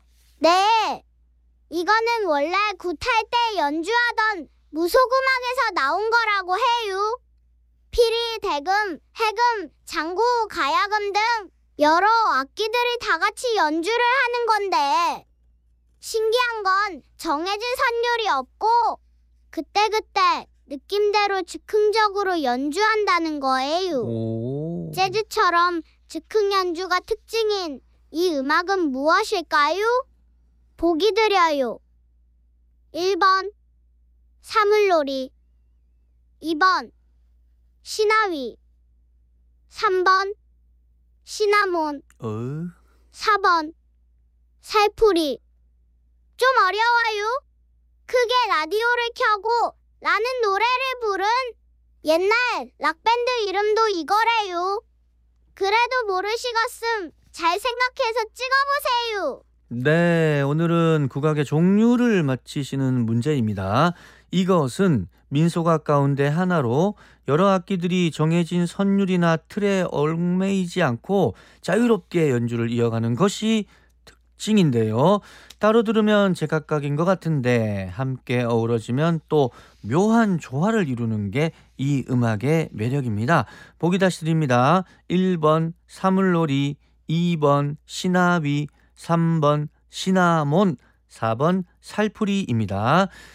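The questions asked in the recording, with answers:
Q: 재즈처럼 즉흥 연주가 특징인 이 음악은 무엇일까요?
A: 2: 시나위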